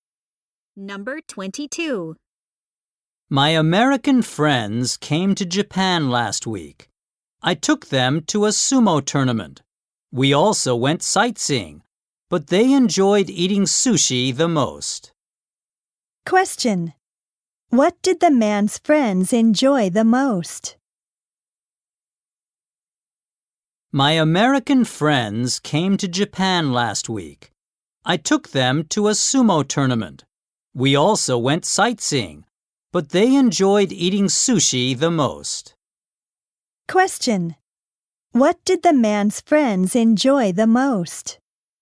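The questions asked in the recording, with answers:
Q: What did the man's friends enjoy the most?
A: Eating sushi.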